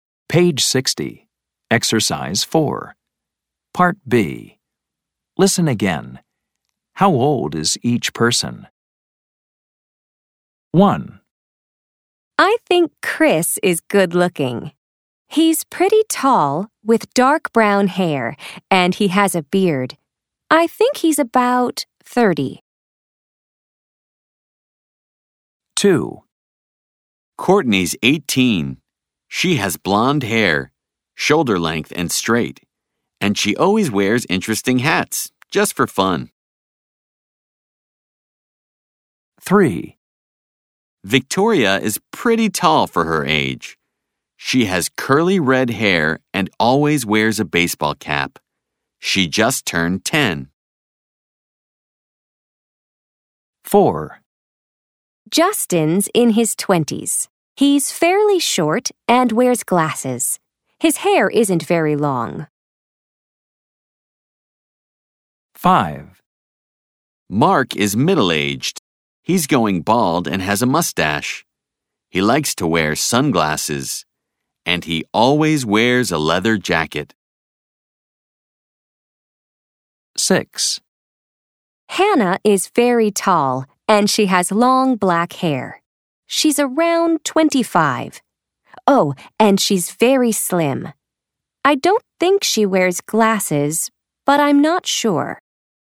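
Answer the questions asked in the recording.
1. Chris: about 30
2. Courtney: 18
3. Victoria: 10
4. Justin: in his 20s
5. Mark: middle-aged
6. Hannah: around 25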